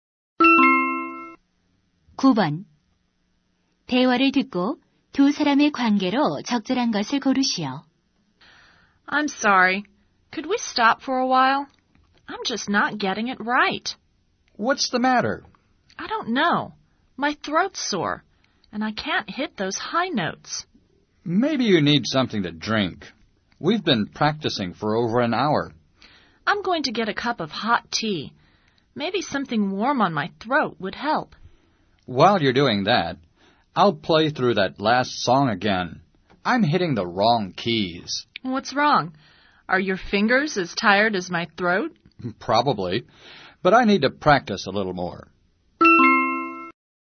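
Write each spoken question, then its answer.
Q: 대화를 듣고 두 사람의 관계로 적절한 것을 고르시오.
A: 가수와 피아노 반주자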